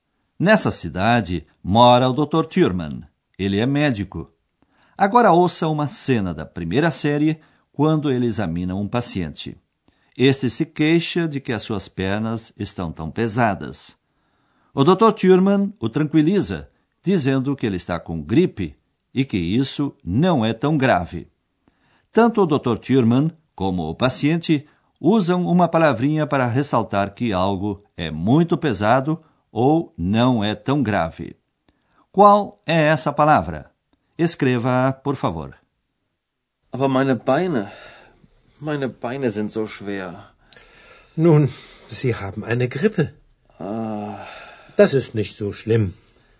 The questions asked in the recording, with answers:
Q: Qual é essa palavra?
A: E a última era a palavrinha zo, tão.